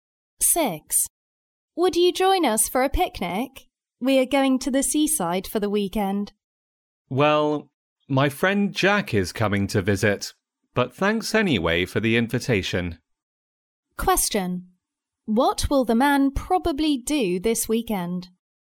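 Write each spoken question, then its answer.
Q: What will the man probably do this weekend?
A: Stay and spend time with his visiting friend Jack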